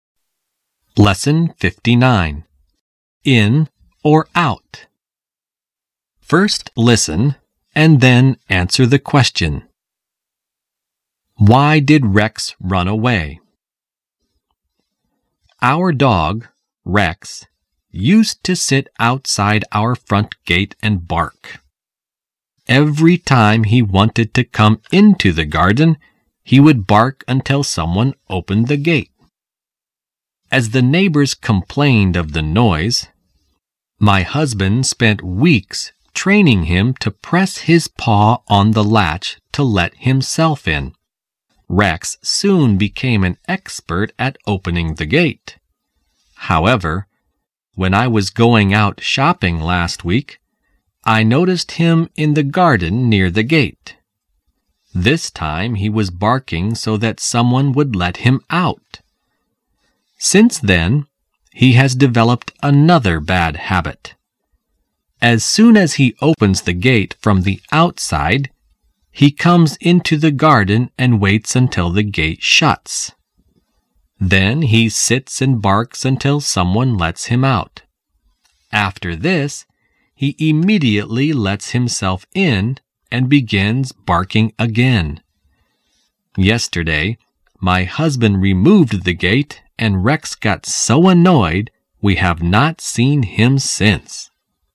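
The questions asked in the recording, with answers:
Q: Why did Rex run away?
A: Because the husband removed the gate and Rex got annoyed.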